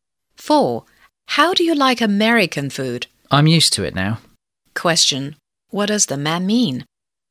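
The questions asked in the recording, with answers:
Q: What does the man mean?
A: He has got used to American food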